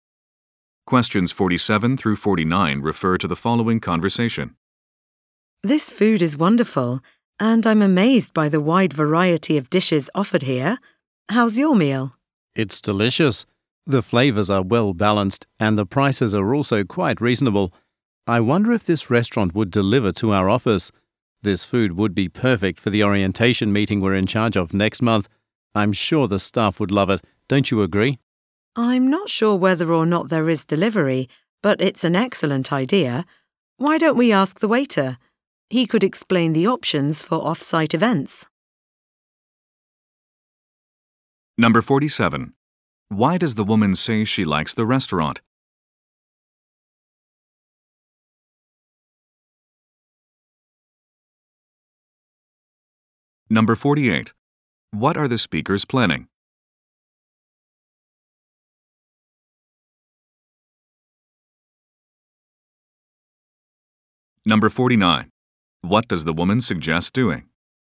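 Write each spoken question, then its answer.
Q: Why does the woman say she likes the restaurant?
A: It has a wide variety of dishes

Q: What are the speakers planning?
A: An orientation meeting

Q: What does the woman suggest doing?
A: Asking the waiter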